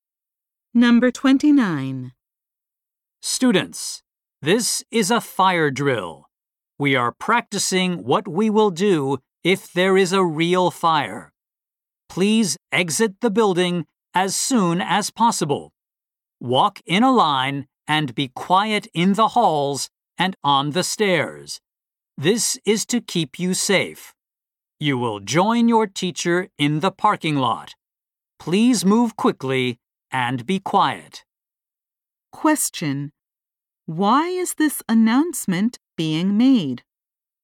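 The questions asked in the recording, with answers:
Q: Why is this announcement being made?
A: It is a fire drill to practice what to do in a real fire.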